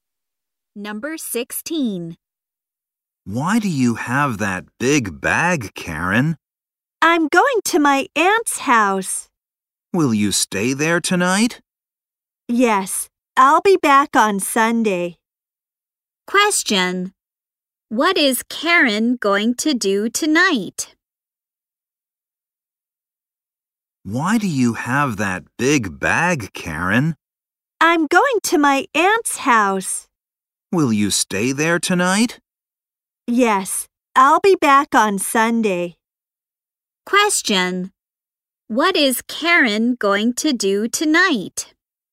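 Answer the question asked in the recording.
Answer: Stay at her aunt's house.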